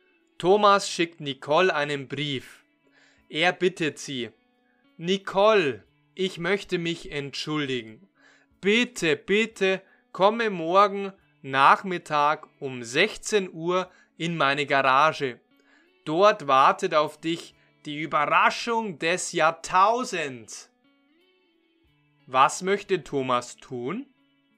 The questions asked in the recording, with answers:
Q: Was möchte Thomas tun?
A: Er möchte sich bei Nicole entschuldigen.